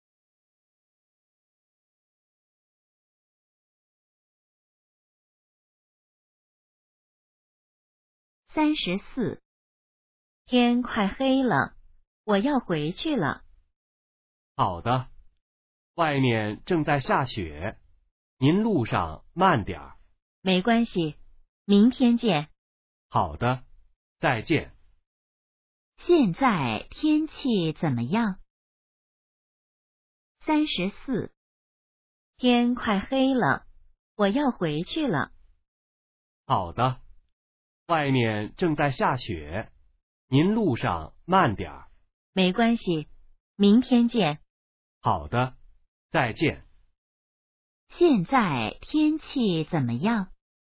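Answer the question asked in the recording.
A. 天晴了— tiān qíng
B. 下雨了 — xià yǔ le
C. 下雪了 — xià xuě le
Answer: C. 下雪了 — xià xuě le

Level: HSK2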